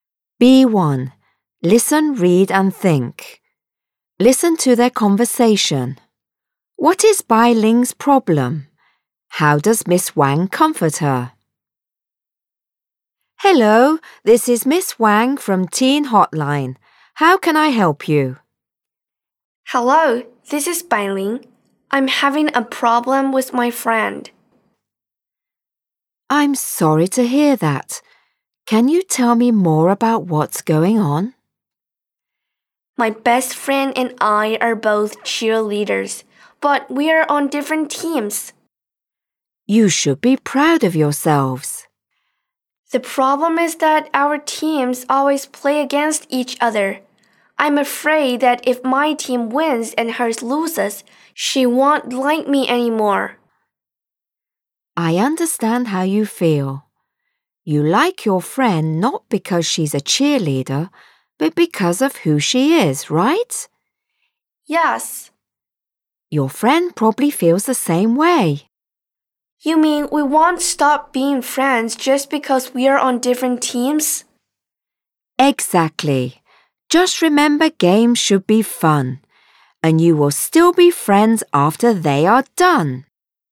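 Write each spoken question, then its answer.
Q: What is Bailing's problem?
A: She and her best friend are cheerleaders on different teams that play against each other, and she's afraid her friend won't like her anymore if her team wins.

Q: How does Miss Wang comfort her?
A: She says they like each other for who they are, so they will still be friends; games should be fun.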